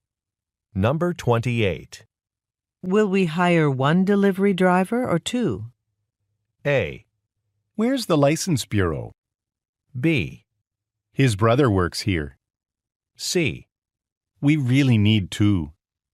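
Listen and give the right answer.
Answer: C: We really need two.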